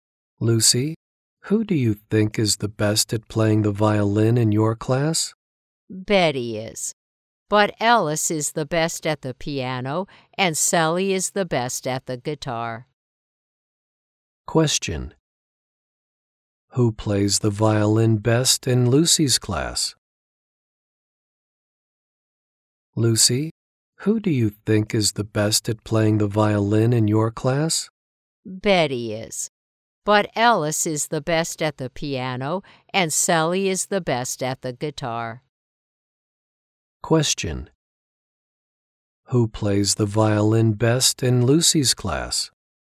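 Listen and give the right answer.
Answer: Betty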